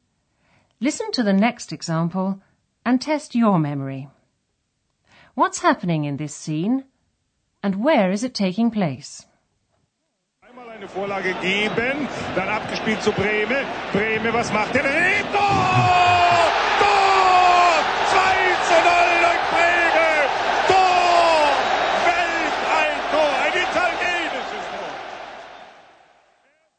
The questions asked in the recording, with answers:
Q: What's happening in this scene and where is it taking place?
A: that was an excerpt from a football commentary